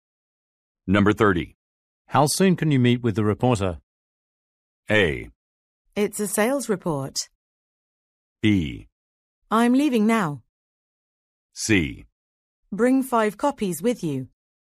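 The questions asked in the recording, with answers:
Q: How soon can you meet with the reporter?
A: B: I'm leaving now.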